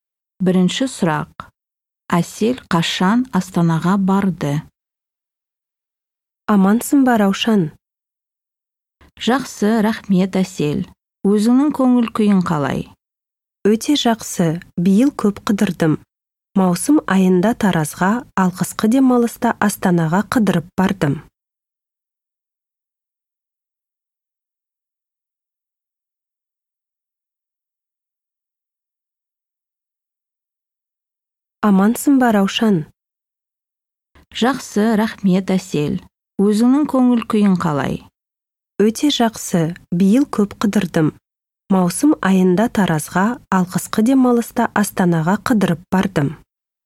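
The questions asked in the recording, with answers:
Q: Әсел қашан Астанаға барды?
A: қысқы демалыста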